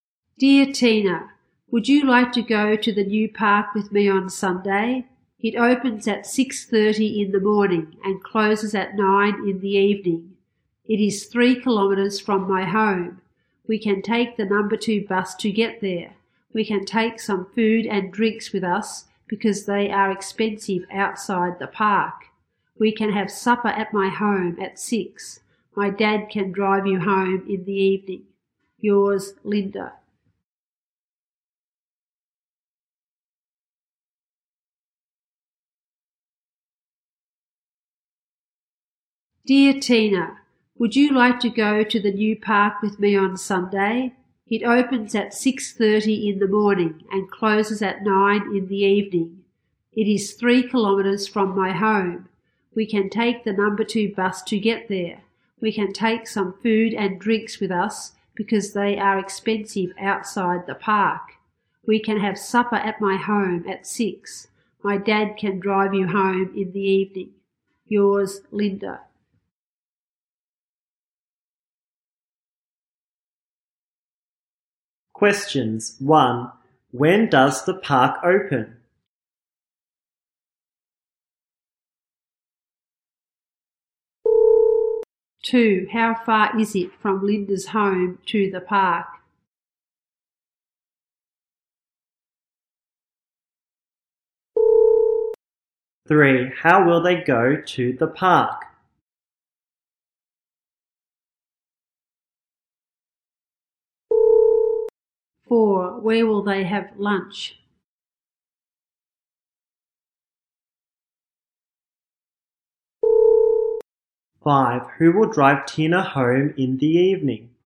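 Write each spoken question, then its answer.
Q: When does the park open?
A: At 6:30 in the morning

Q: How far is it from Linda's home to the park?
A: 3 kilometers

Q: How will they go to the park?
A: By the number 2 bus

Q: Who will drive Tina home in the evening?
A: Linda's dad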